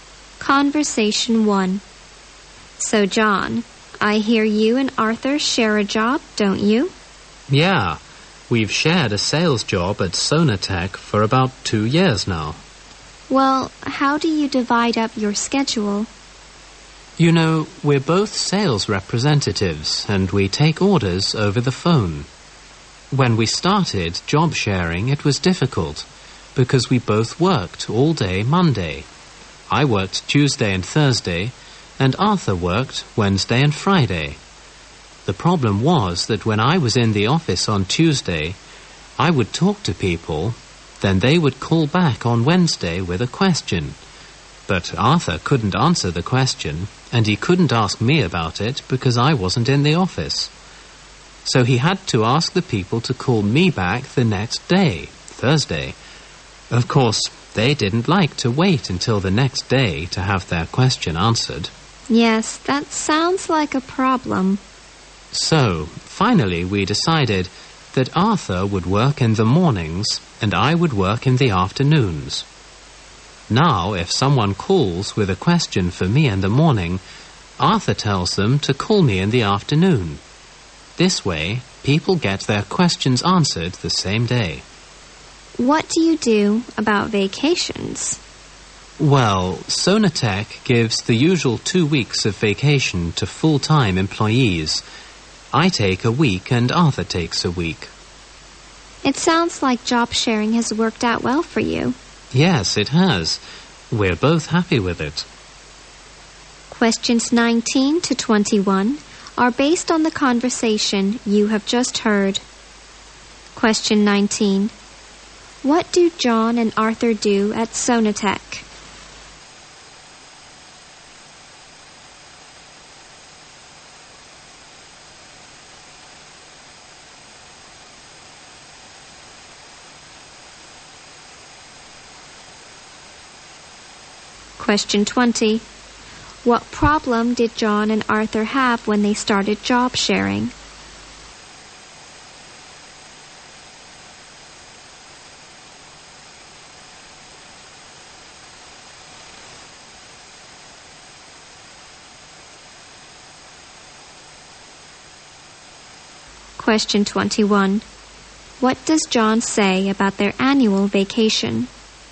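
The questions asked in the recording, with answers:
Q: What do John and Arthur do at Sonatech?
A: They are sales representatives who take orders over the phone

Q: What problem did John and Arthur have when they started job sharing?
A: Customers had to wait until the next day to get their questions answered

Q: What does John say about their annual vacation?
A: They split the two weeks, each taking one week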